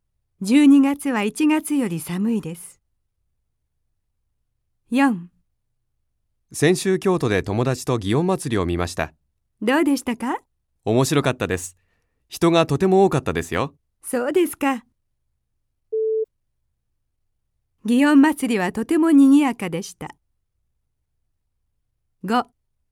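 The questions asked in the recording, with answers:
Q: 祇園祭りはとても賑やかでした。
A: ○ (正しい)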